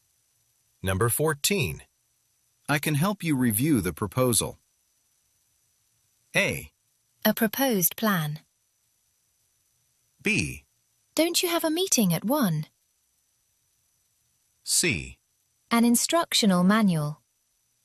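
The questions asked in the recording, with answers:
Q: I can help you review the proposal.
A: B: Don't you have a meeting at 1?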